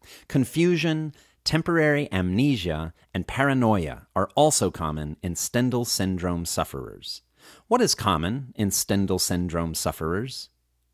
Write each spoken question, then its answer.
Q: What is common in Stendhal syndrome sufferers?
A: Confusion, temporary amnesia, and paranoia are common in Stendhal syndrome sufferers.